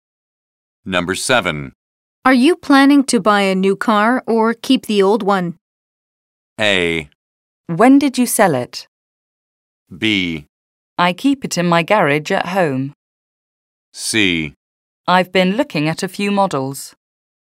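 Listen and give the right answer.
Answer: C: I've been looking at a few models.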